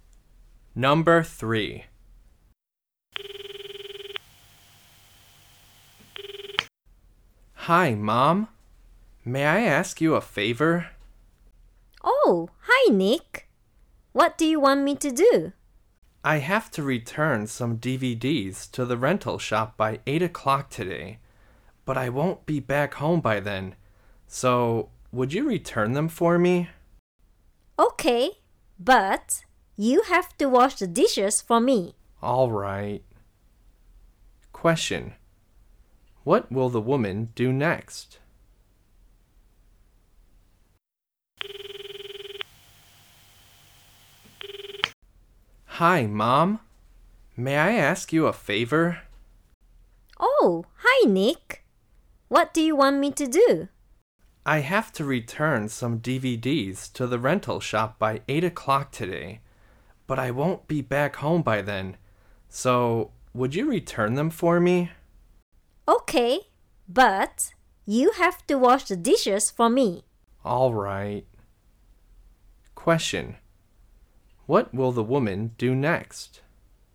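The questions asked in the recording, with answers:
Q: What will the woman do next?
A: Return the DVDs to the rental shop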